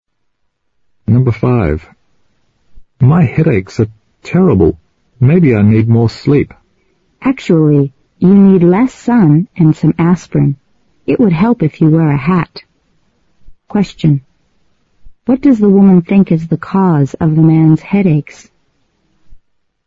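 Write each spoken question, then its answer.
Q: What does the woman think is the cause of the man's headaches?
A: Too much sun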